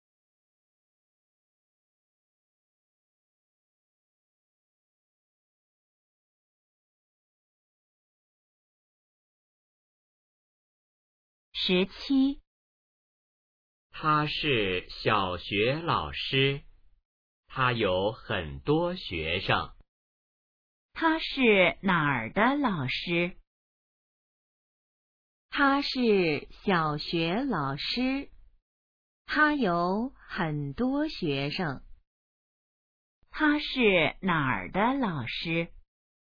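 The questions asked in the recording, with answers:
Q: 他是哪儿的老师?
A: 小学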